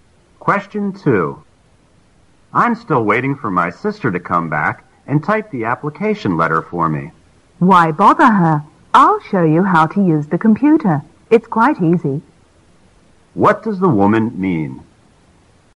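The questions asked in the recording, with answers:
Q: What does the woman mean?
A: She will show the man how to type the letter on the computer himself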